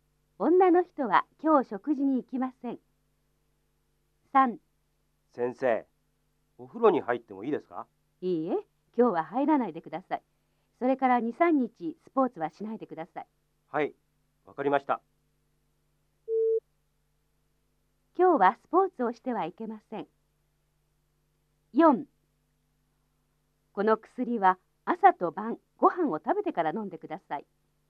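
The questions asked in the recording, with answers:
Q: 今日はスポーツをしてはいけません。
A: ○(正しい)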